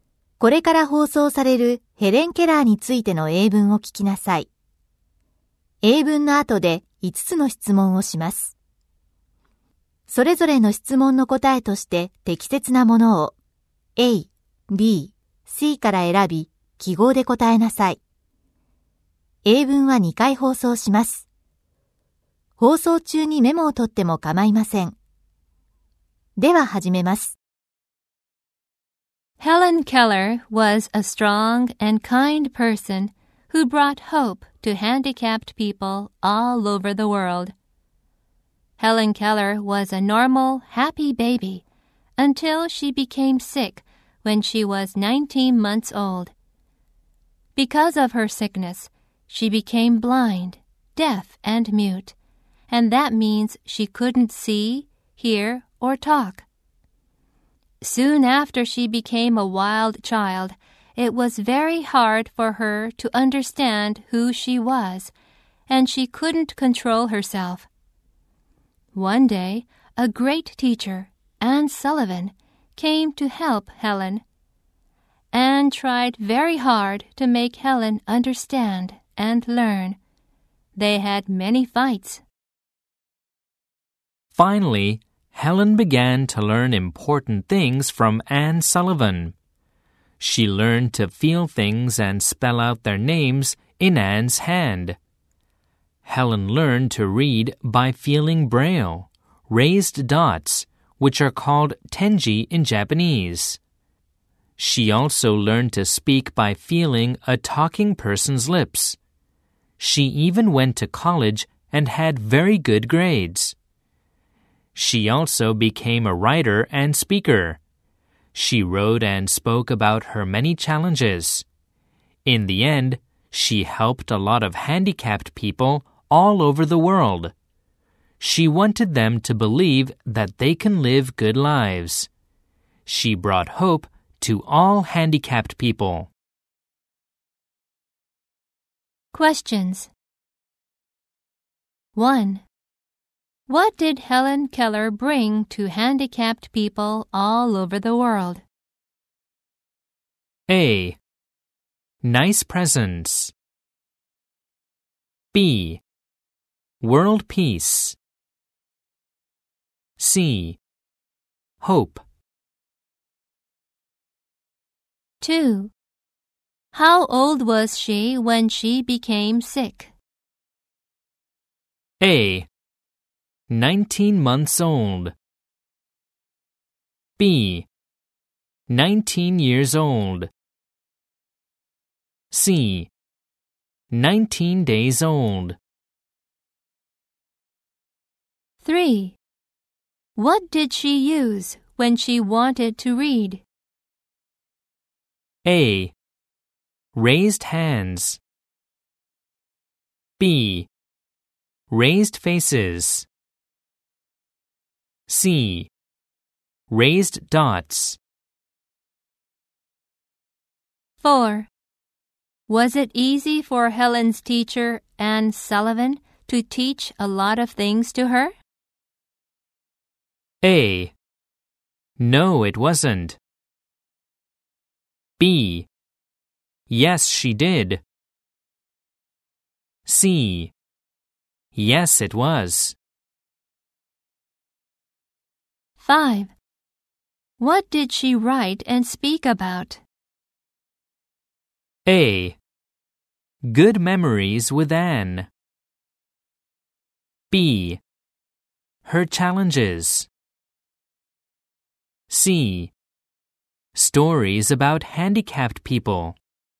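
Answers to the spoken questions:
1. C: Hope.
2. A: 19 months old.
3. C: Raised dots.
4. A: No, it wasn't.
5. B: Her challenges.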